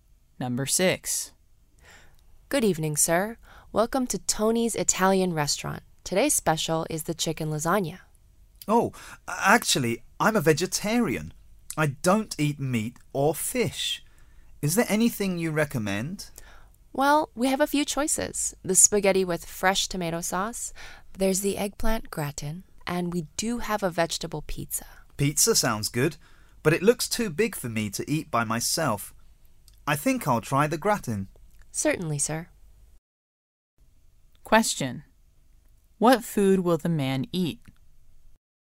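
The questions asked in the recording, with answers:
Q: What food will the man eat?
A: The eggplant gratin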